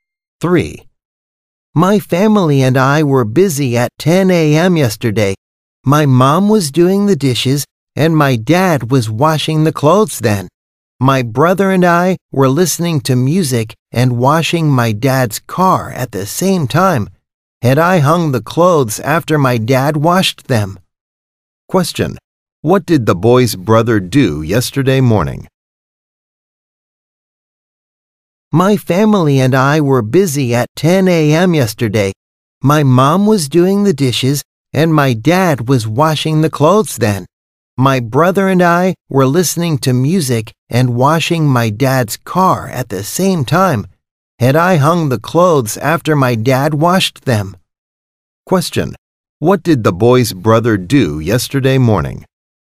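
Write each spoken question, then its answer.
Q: Question, what did the boy's brother do yesterday morning?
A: Listened to music and washed the car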